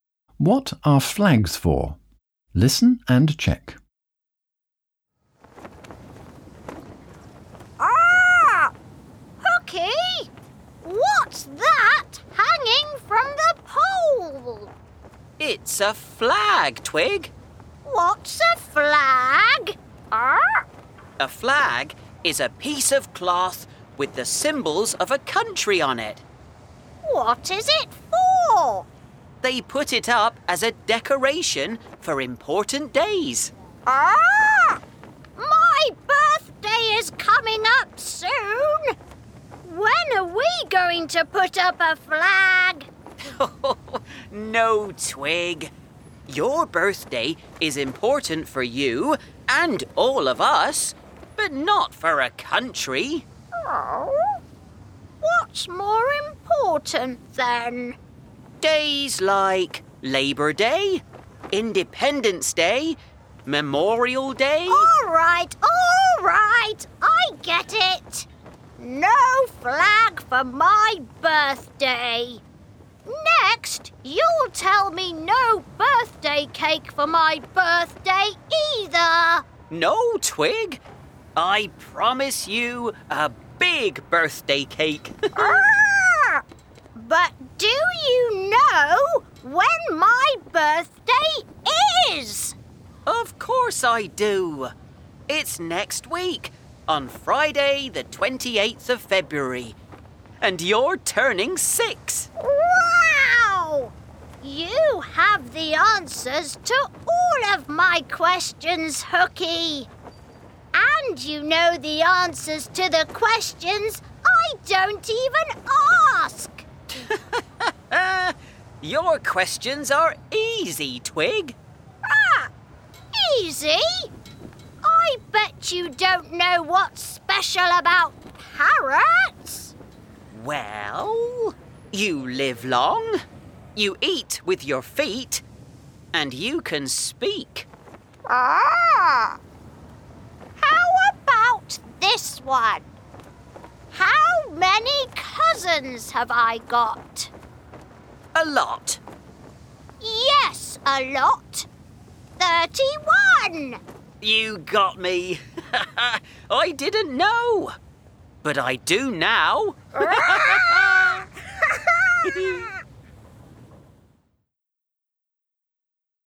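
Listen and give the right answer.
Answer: They are put up as a decoration for important days, like Labor Day, Independence Day and Memorial Day.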